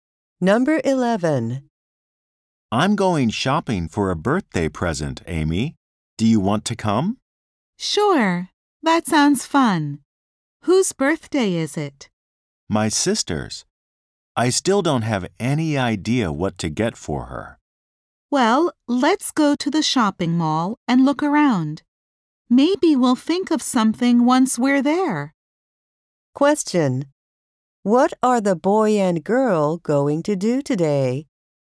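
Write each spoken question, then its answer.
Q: What are the boy and girl going to do today?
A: Go to the shopping mall to look for a birthday present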